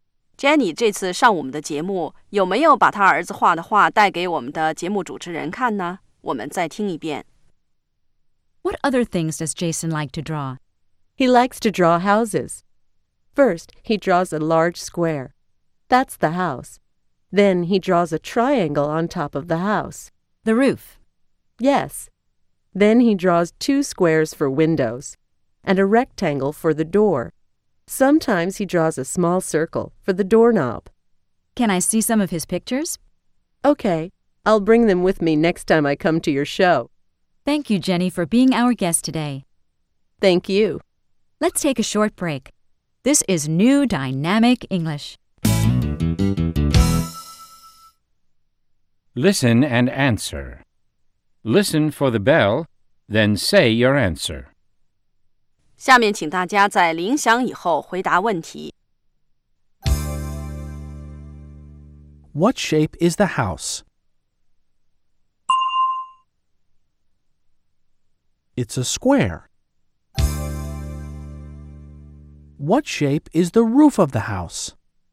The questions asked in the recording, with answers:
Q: What shape is the house?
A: It's a square.

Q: What shape is the roof of the house?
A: It's a triangle.